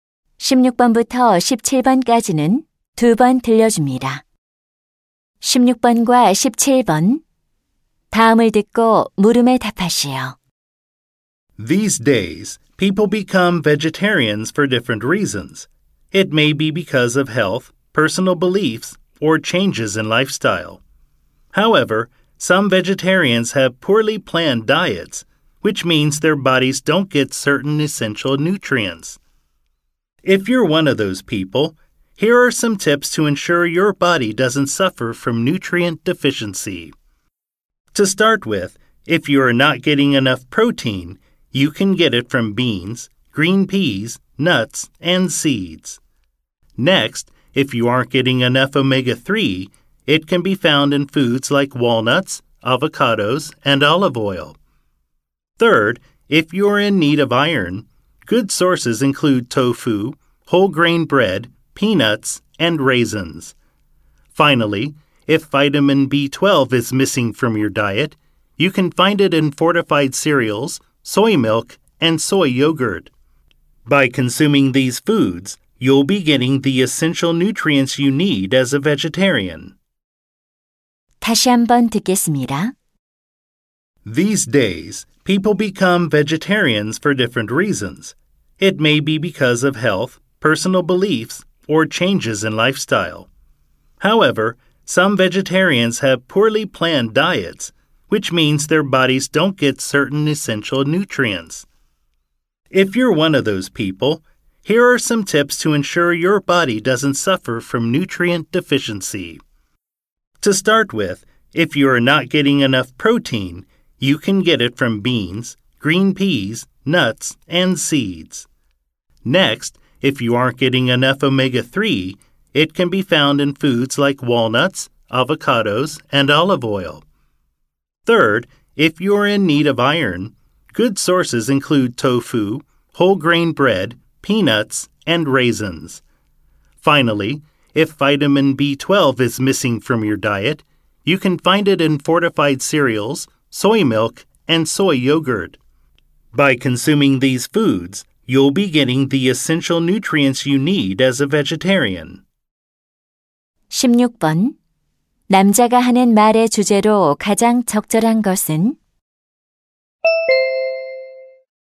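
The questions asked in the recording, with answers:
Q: 남자가 하는 말의 주제로 가장 적절한 것은?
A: 채식주의자가 필수 영양소를 섭취할 수 있는 음식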